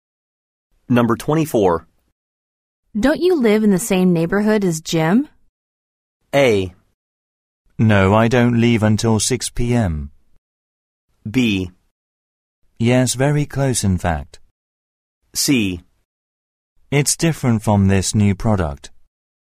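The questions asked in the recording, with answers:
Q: Don't you live in the same neighborhood as Jim?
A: B: Yes, very close, in fact.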